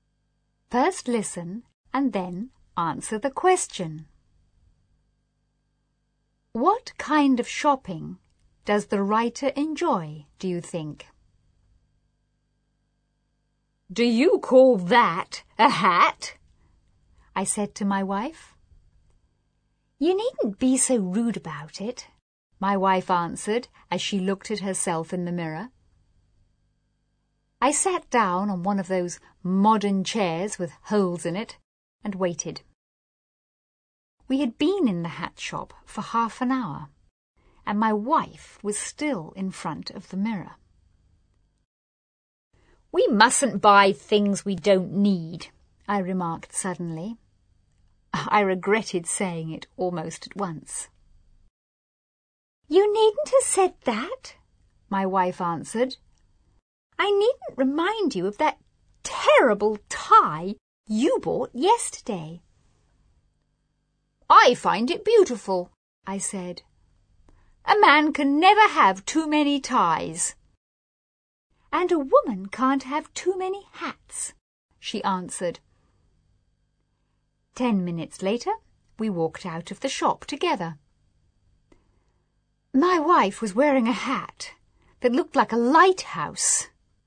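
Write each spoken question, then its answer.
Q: What kind of shopping does the writer enjoy, do you think?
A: Buying ties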